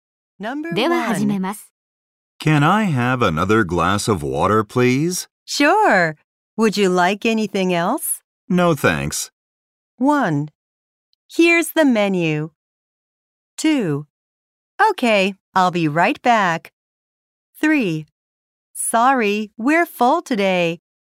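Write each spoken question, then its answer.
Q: No, thanks.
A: 2: Okay, I'll be right back.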